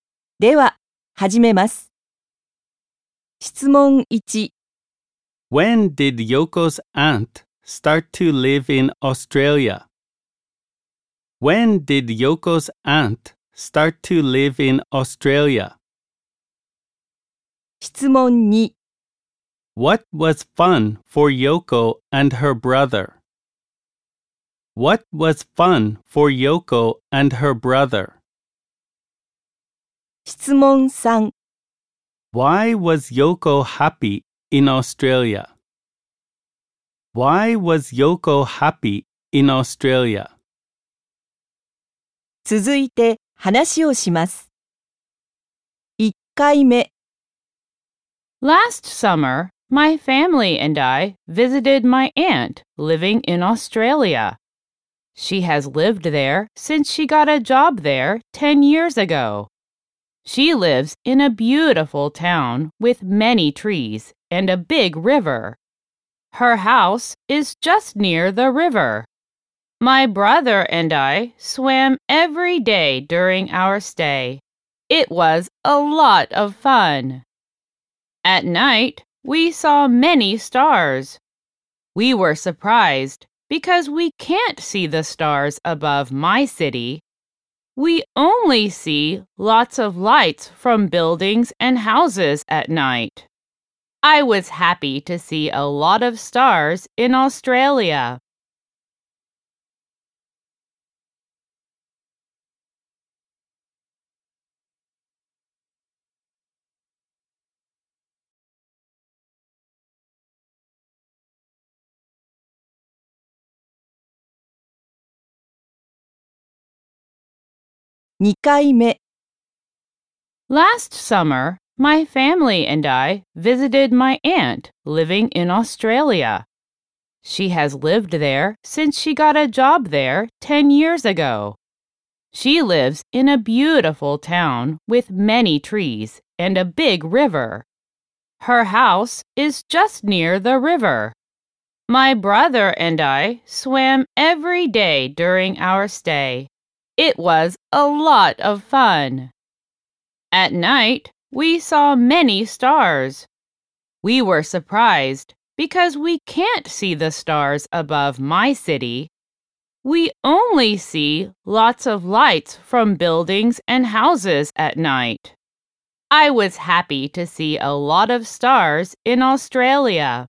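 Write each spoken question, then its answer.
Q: When did Yoko's aunt start to live in Australia?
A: Ten years ago, when she got a job there

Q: What was fun for Yoko and her brother?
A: Swimming in the river every day

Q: Why was Yoko happy in Australia?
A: Because she saw a lot of stars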